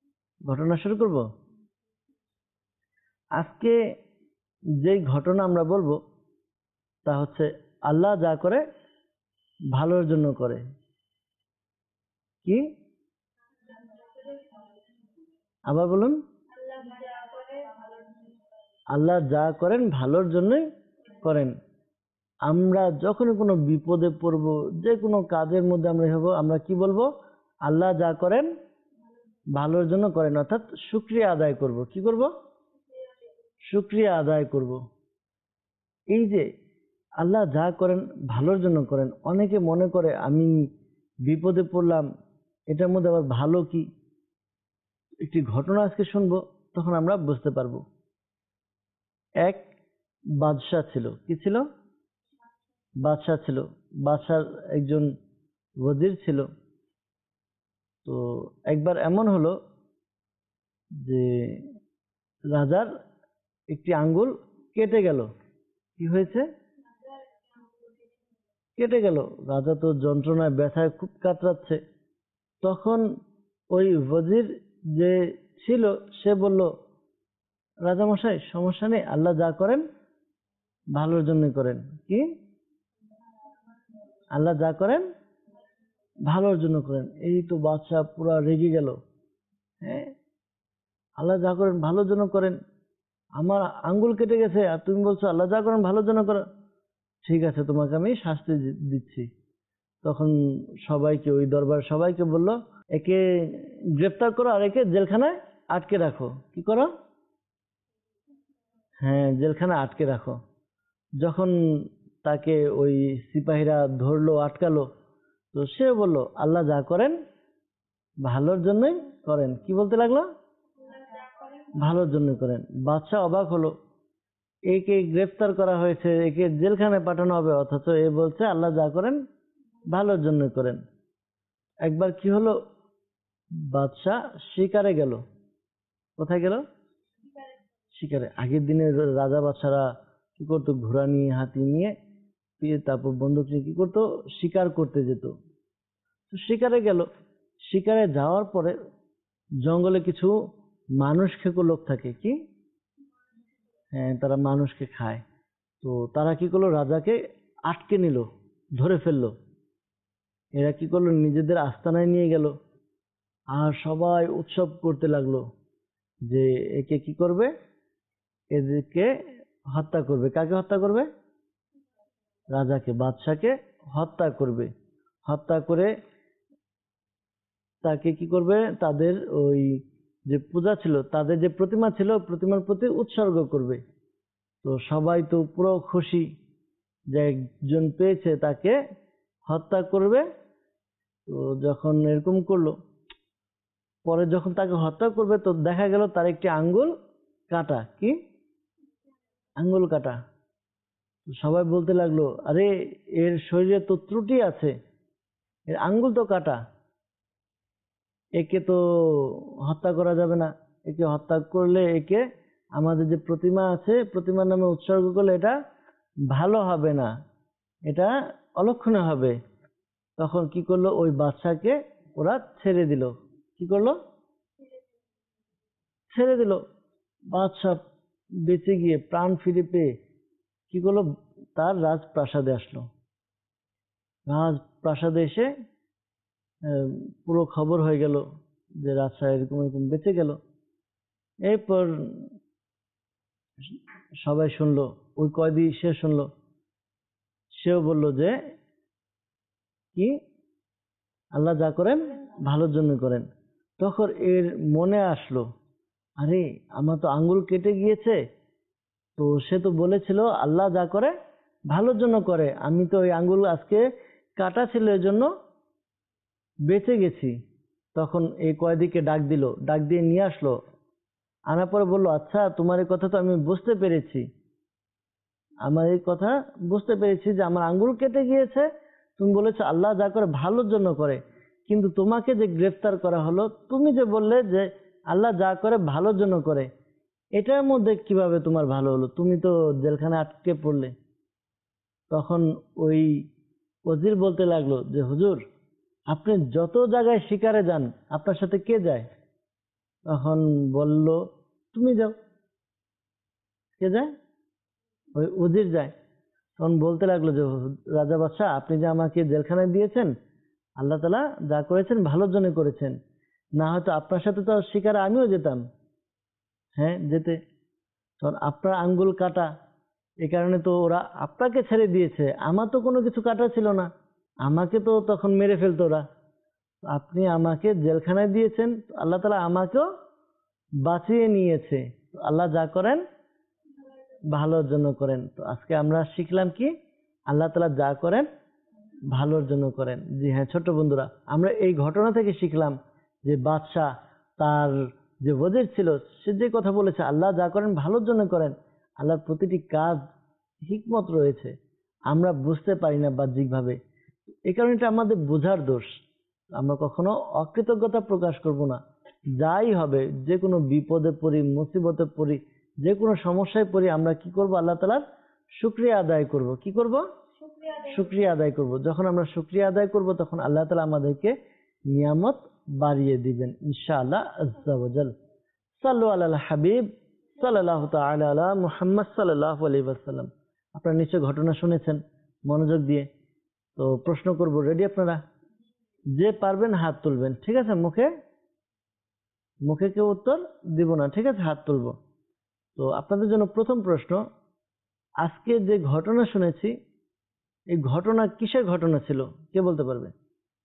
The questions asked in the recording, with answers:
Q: আজকে যে ঘটনা শুনেছি এই ঘটনা কিসের ঘটনা ছিল, কে বলতে পারবে?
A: আল্লাহ যা করেন ভালোর জন্য করেন।